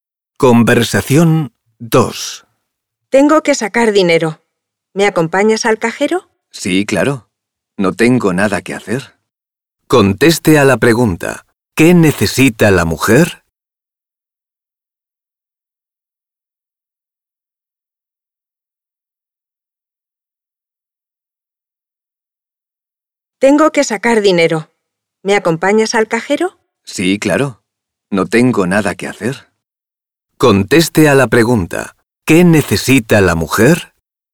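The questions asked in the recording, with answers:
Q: ¿Qué necesita la mujer?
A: Sacar dinero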